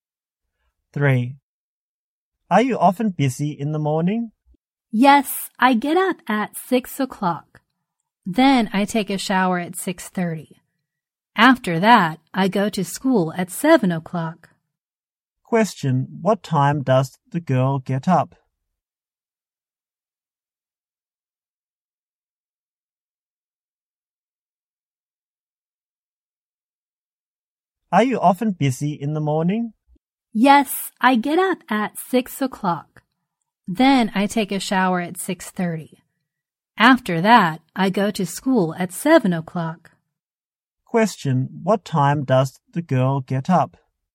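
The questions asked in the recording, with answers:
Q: what time does the girl get up?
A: 6 o'clock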